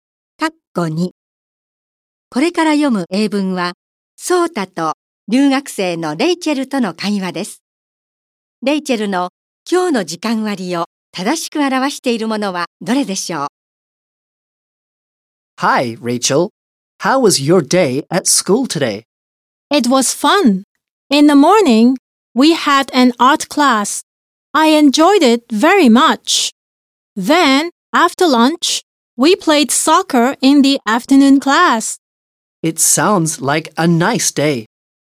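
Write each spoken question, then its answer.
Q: レイチェルの今日の時間割を正しく表しているものはどれでしょう?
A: 午前は美術、午後はサッカー(体育)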